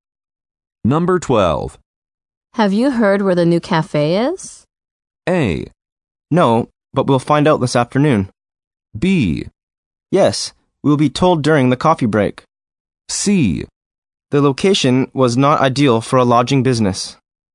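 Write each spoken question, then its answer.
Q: Have you heard where the new cafe is?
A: A: No, but we'll find out this afternoon.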